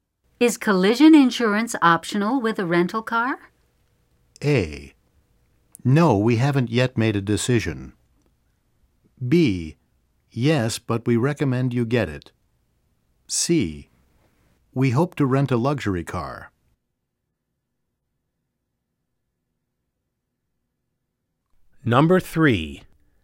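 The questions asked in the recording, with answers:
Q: Is collision insurance optional with a rental car?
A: B: Yes, but we recommend you get it.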